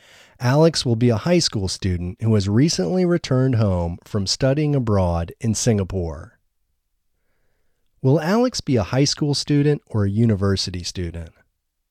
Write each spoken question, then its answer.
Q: Will Alex be a high school student or a university student?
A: Alex will be a high school student.